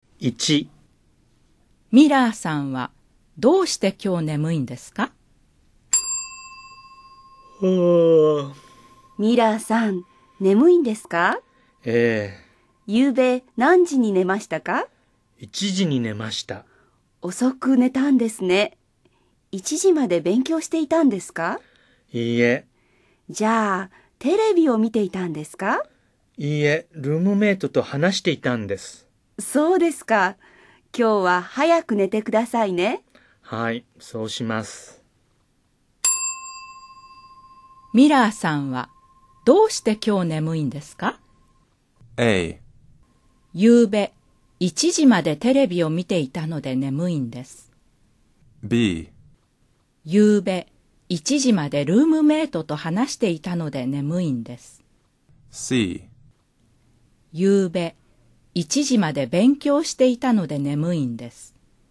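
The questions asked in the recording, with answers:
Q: ミラーさんはどうして今日眠いんですか?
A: B: 夕べ1時までルームメイトと話していたので眠いんです。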